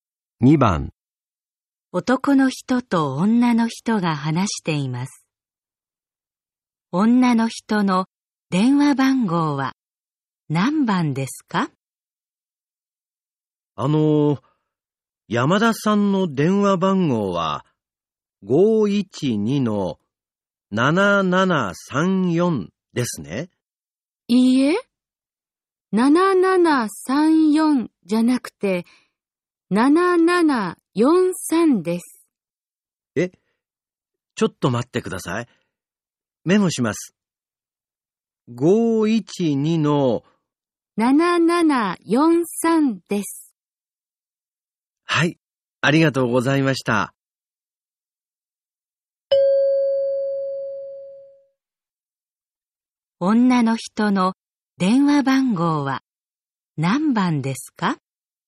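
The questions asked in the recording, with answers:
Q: 女の人の電話番号は何番ですか?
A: 512-7743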